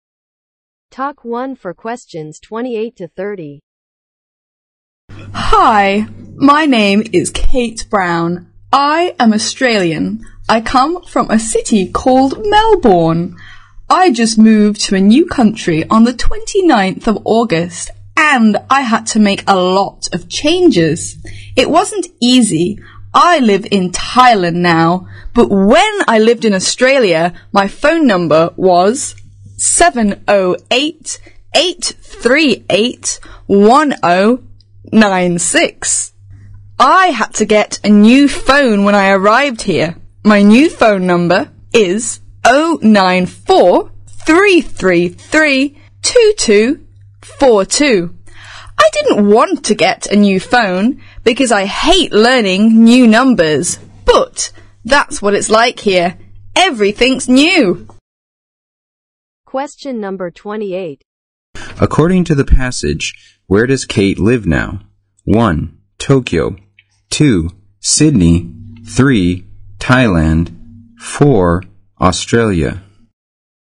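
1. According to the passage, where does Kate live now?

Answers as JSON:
{"1": "Thailand"}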